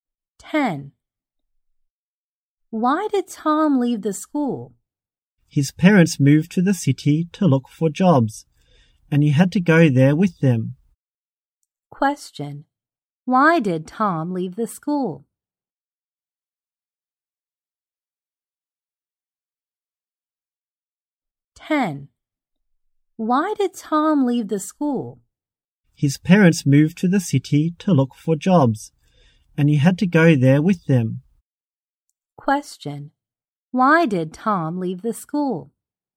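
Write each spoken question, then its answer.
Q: Why did Tom leave the school?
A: His parents moved to the city to look for jobs and he had to go with them.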